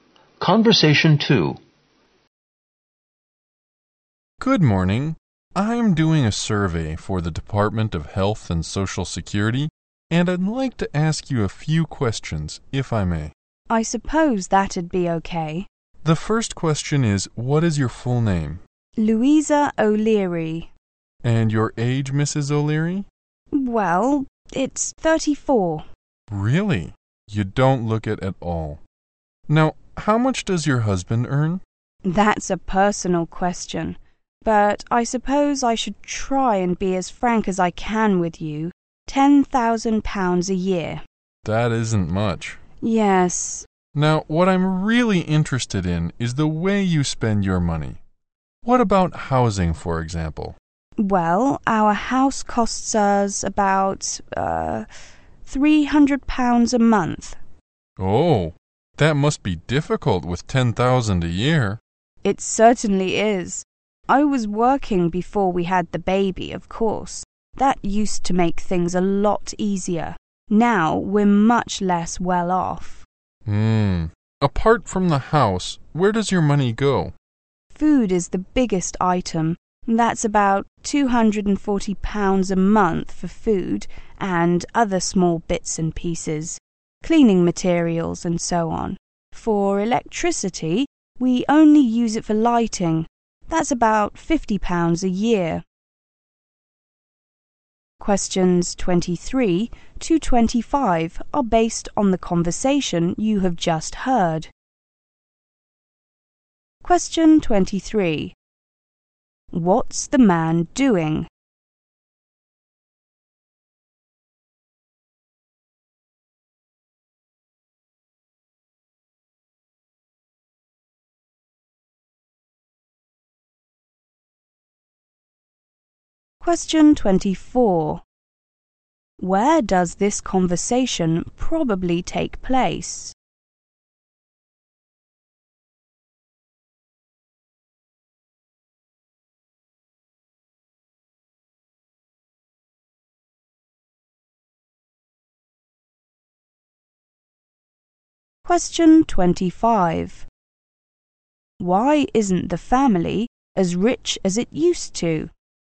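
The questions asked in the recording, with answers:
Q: What's the man doing?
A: Doing a survey for the Department of Health and Social Security

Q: Why isn't the family as rich as it used to?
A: The wife stopped working after they had the baby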